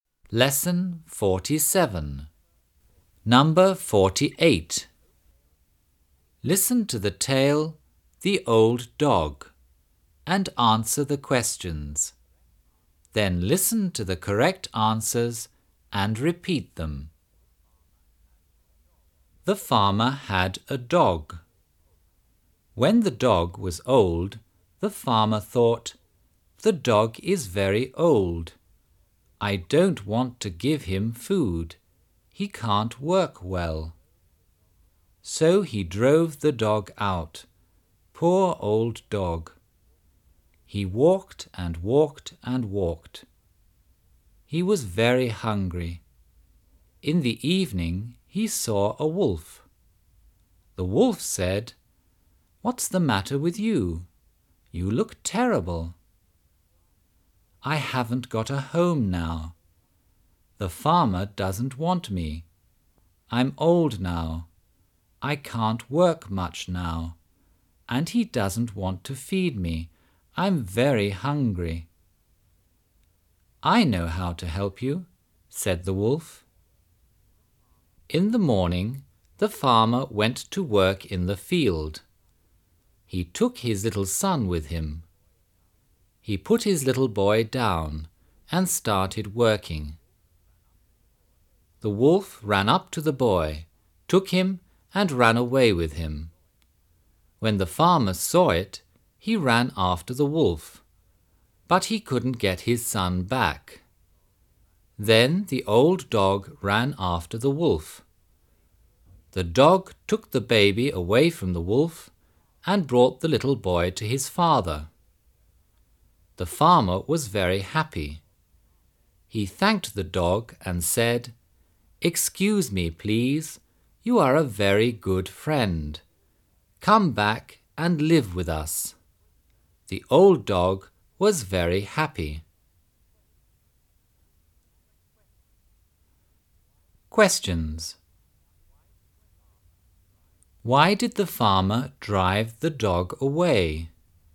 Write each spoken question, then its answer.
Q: Why did the farmer drive the dog away?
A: The dog was old and couldn't work well.